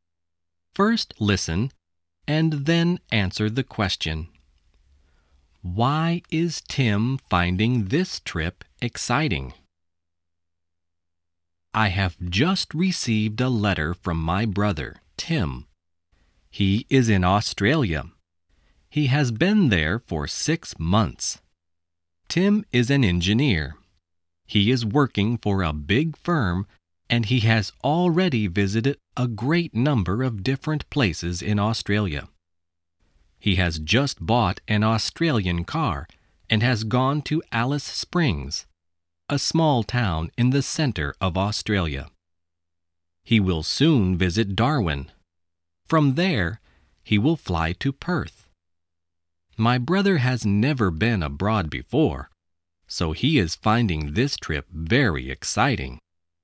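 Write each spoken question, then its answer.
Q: Why is Tim finding this trip exciting?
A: Because he has never been abroad before.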